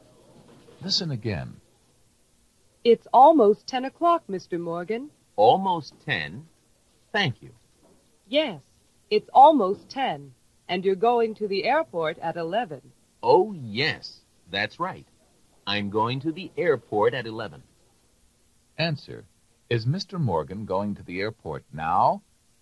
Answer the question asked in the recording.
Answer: No, he's not.